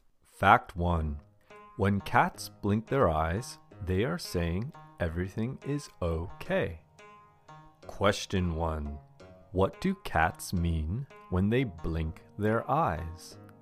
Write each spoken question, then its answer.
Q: what do cats mean when they blink their eyes?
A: When cats blink their eyes, they are saying everything is okay.